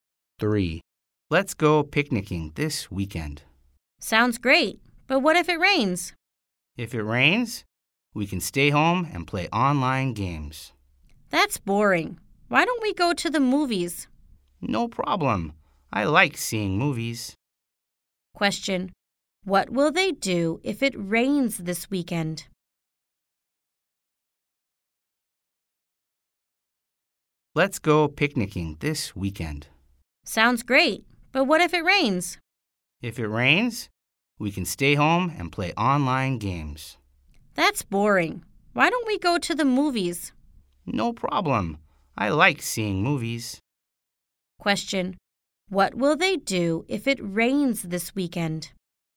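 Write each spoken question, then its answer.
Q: What will they do if it rains this weekend?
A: Go to the movies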